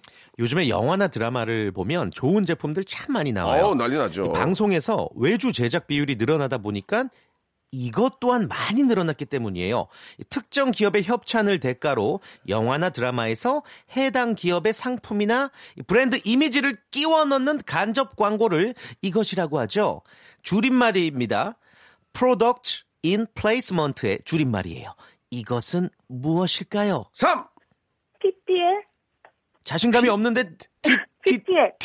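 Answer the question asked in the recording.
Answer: PPL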